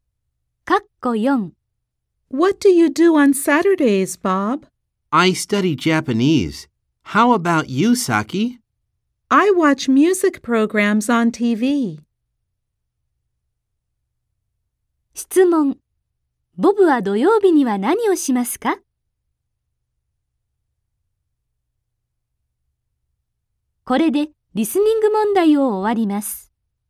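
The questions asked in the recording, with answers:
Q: ボブは土曜日には何をしますか?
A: 日本語を勉強する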